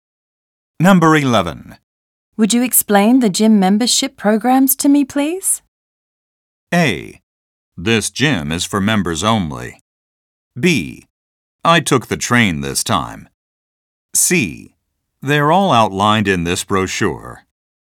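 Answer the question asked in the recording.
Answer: C: They're all outlined in this brochure.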